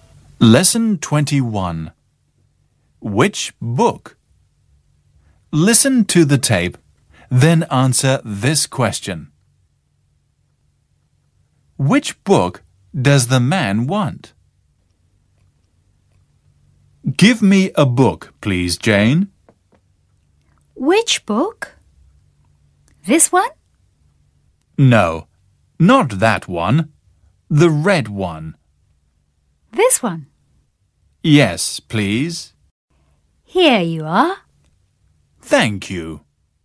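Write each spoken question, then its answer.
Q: Which book does the man want?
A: The red one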